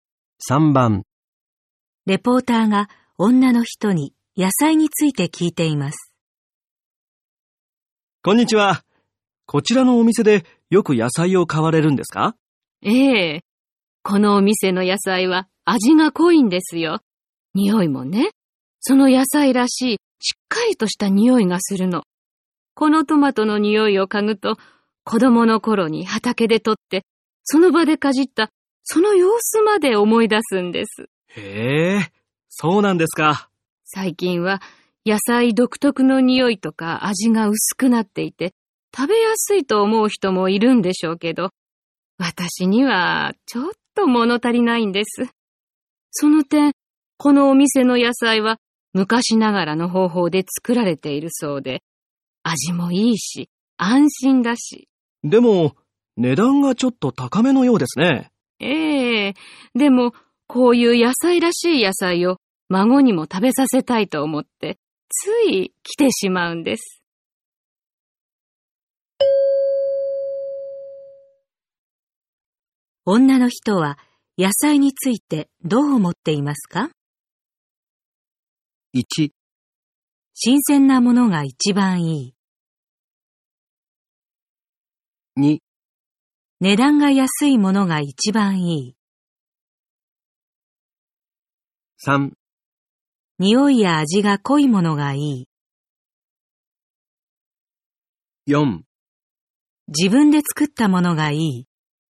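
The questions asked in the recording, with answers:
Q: 女の人は野菜についてどう思っていますか?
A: 3: 匂いや味が濃いものがいい。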